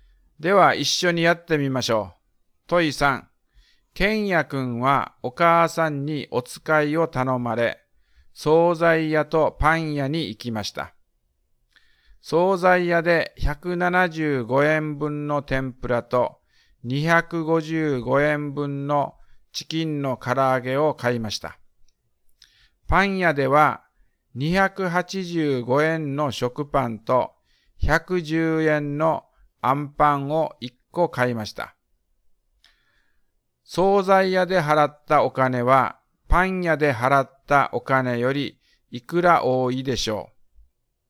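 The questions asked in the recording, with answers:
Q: 惣菜屋で払ったお金は、パン屋で払ったお金よりいくら多いでしょう。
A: (175+255)-(285+110)=35円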